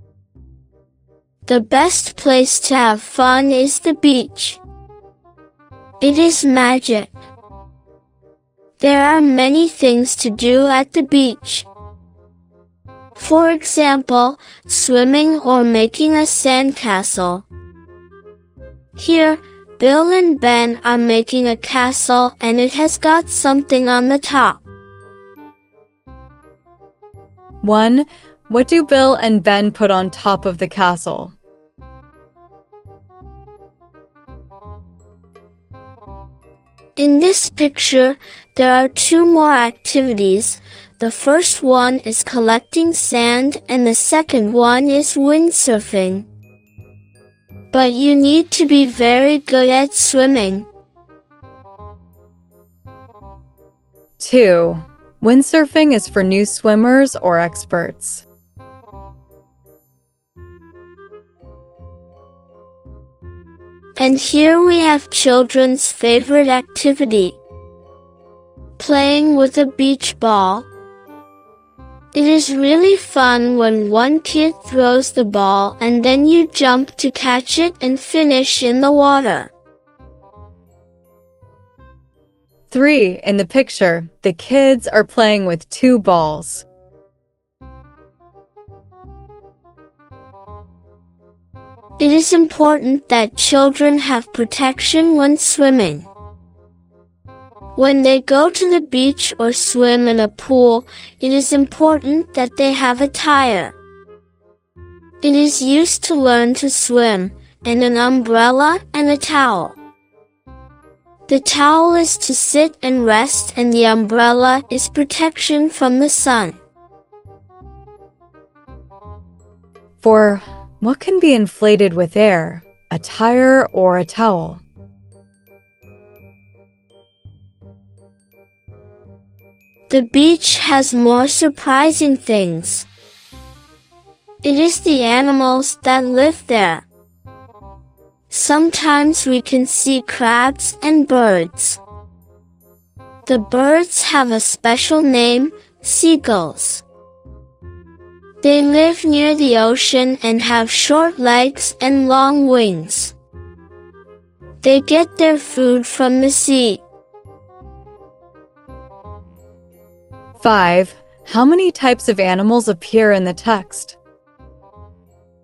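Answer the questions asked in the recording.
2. experts
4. a tire
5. two (crabs and birds/seagulls)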